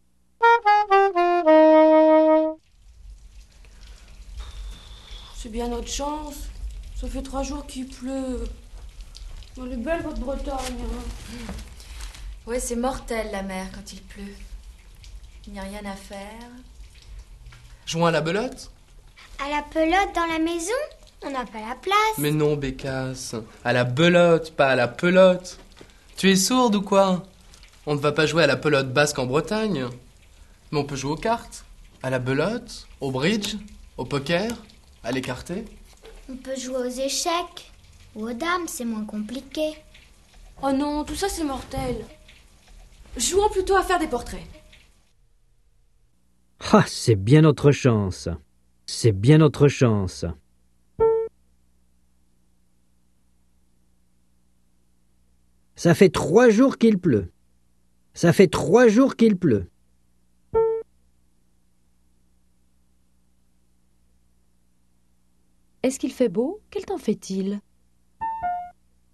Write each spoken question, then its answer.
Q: Est-ce qu'il fait beau? Quel temps fait-il?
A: Il pleut.